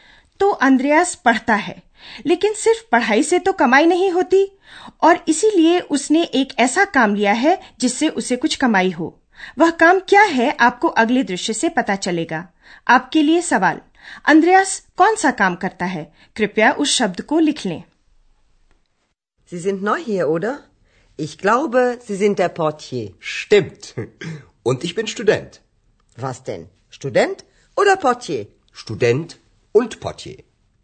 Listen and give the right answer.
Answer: अंद्रयास porter पोटिये का काम करता है